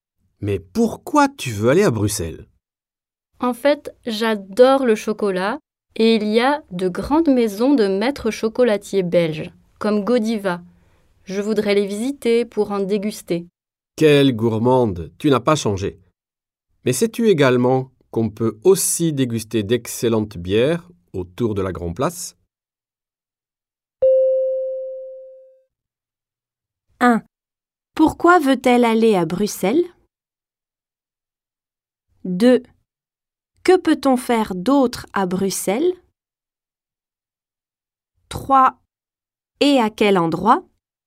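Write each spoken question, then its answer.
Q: Pourquoi veut-elle aller à Bruxelles?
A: Parce qu'elle adore le chocolat et veut visiter les maisons de maîtres chocolatiers belges pour en déguster.

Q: Que peut-on faire d'autre à Bruxelles?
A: Déguster d'excellentes bières.

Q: Et à quel endroit?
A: Autour de la Grand Place.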